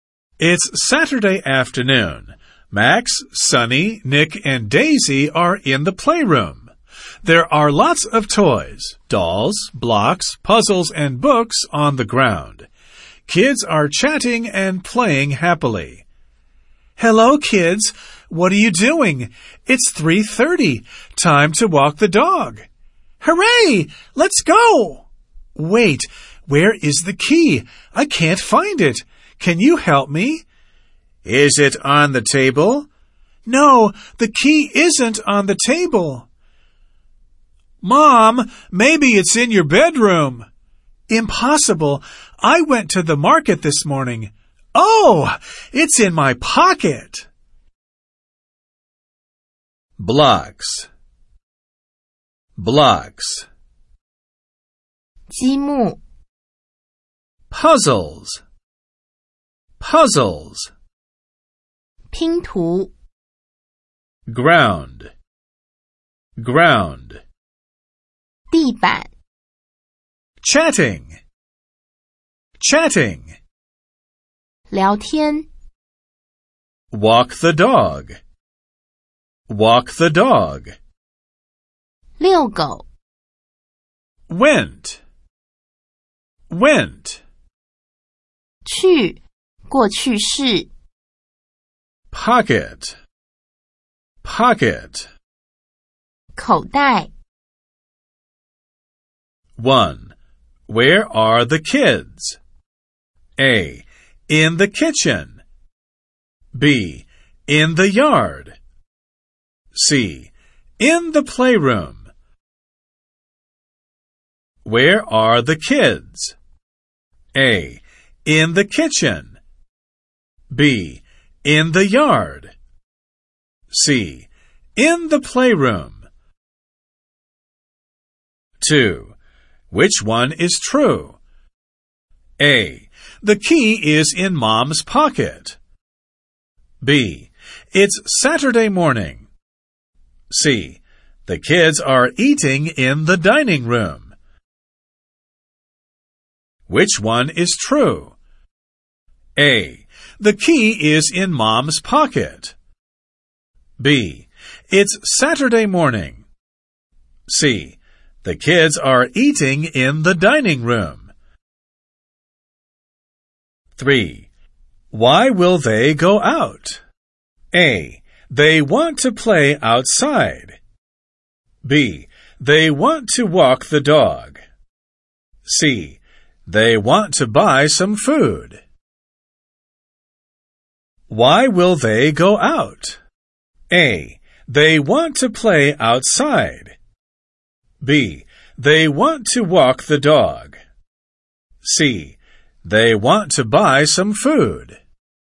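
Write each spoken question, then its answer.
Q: Where are the kids?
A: C: In the playroom.

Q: Which one is true?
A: A: The key is in Mom's pocket.

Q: Why will they go out?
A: B: They want to walk the dog.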